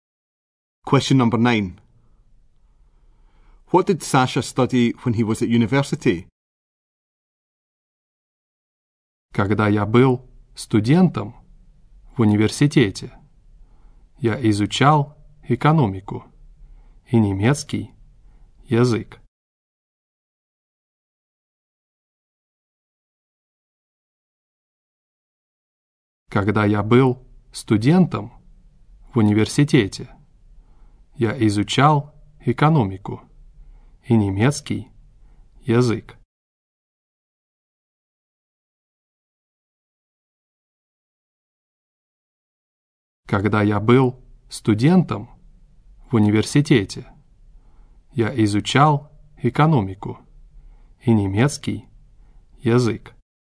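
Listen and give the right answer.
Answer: Economics and German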